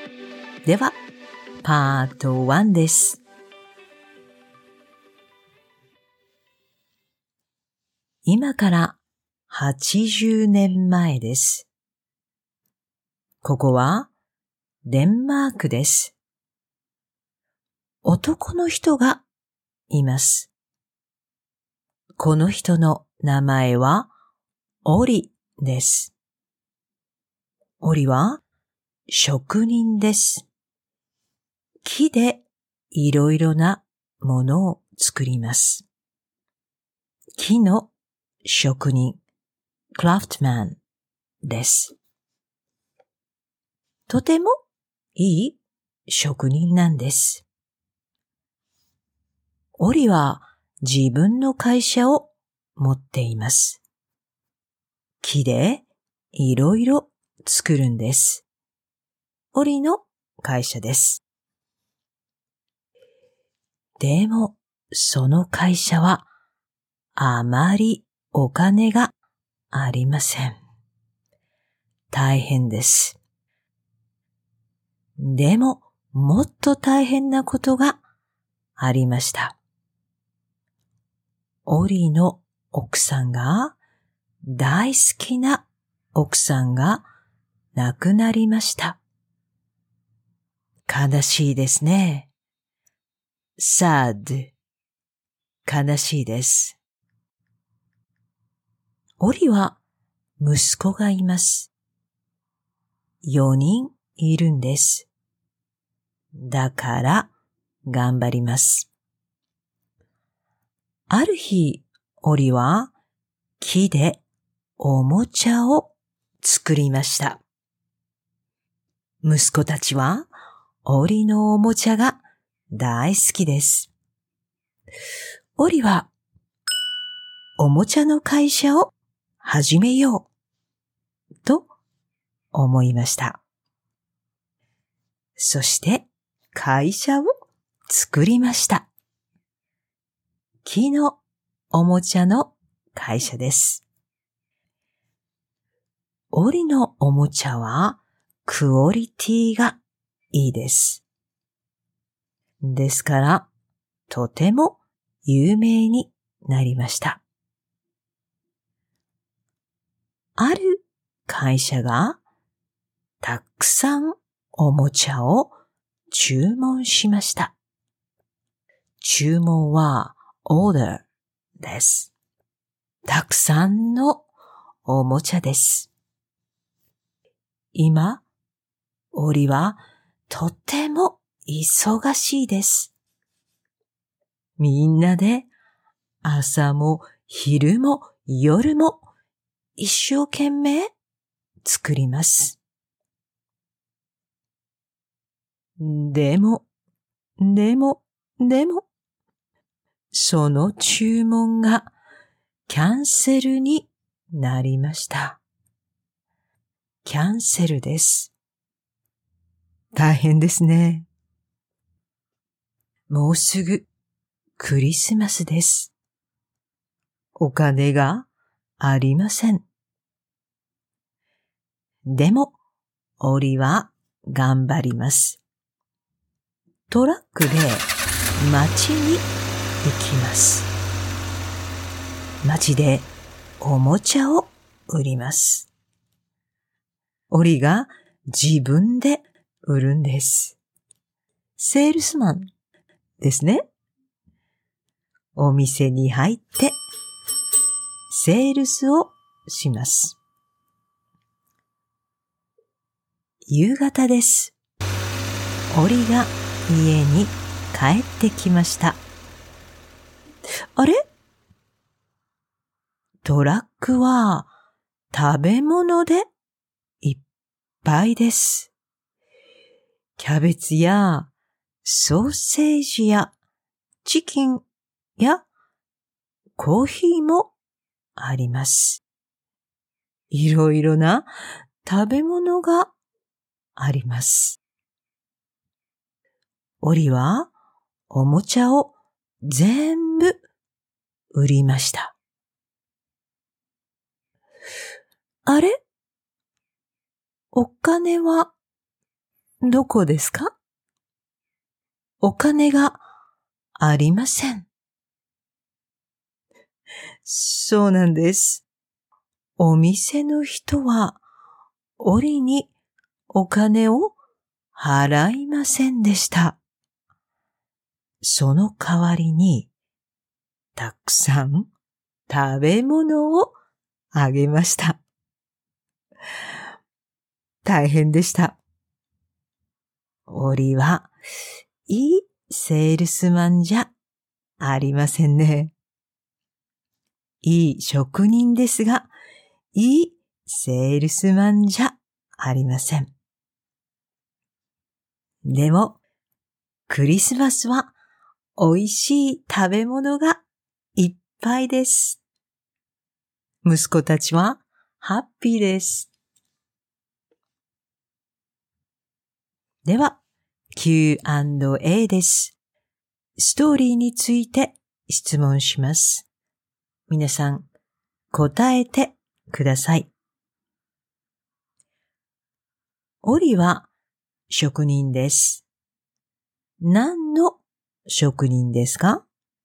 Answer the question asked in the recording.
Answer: 木の職人です。